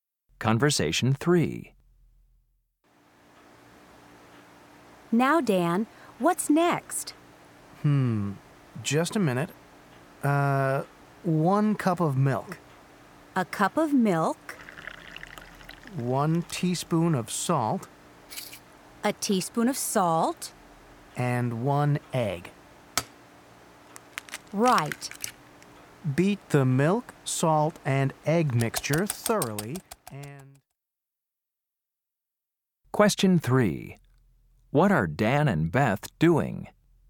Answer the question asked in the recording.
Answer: I really enjoy cooking.